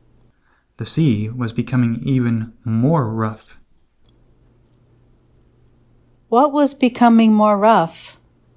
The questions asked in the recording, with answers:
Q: What was becoming more rough?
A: The sea was becoming more rough.